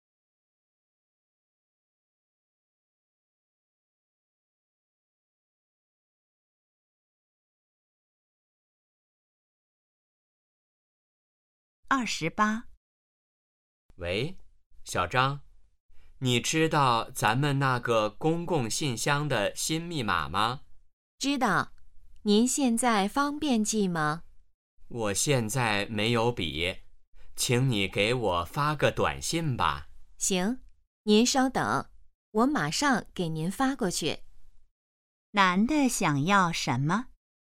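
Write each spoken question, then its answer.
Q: 男的想要什么?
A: 公共信箱的新密码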